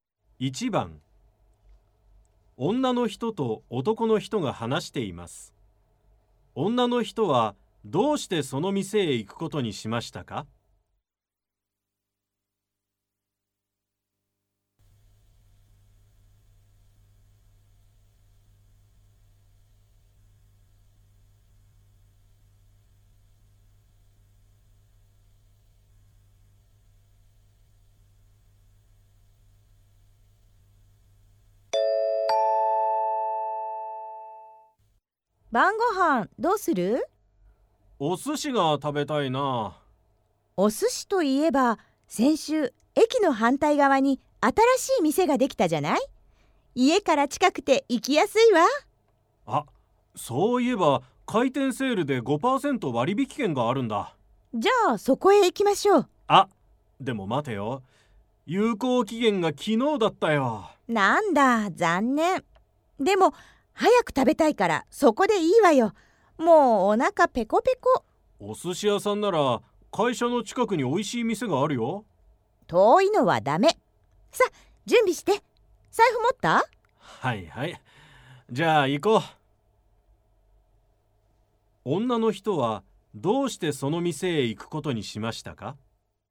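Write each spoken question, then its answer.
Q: 女の人はどうしてその店へ行くことにしましたか?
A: 家から近くて、早く食べたいから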